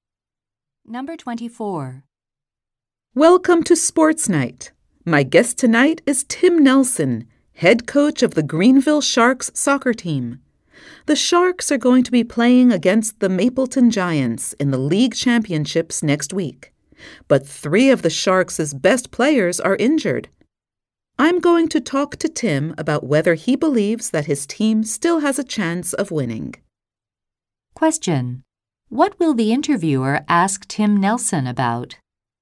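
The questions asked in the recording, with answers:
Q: What will the interviewer ask Tim Nelson about?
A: Whether his team still has a chance of winning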